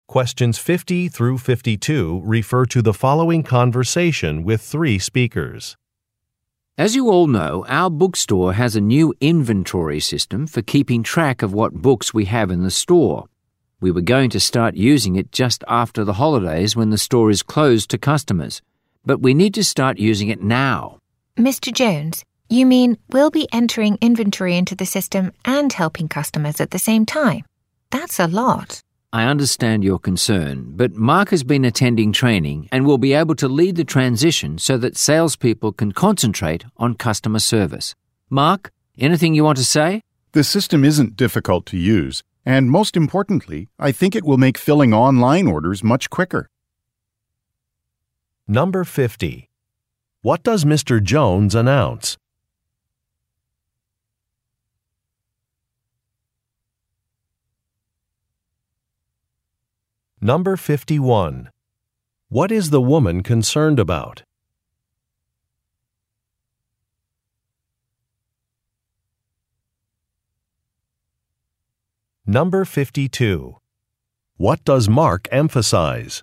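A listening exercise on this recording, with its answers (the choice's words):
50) What does Mr. Jones announce?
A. A change of plans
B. A book-signing event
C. New store hours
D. A price change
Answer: A change of plans

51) What is the woman concerned about?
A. The accuracy of some software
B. An increased workload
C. Customer complaints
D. Running out of supplies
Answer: An increased workload

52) What does Marc emphasize?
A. Reduced operating expenses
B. Greater inventory availability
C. The efficiency of a new system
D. The need for extra training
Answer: The efficiency of a new system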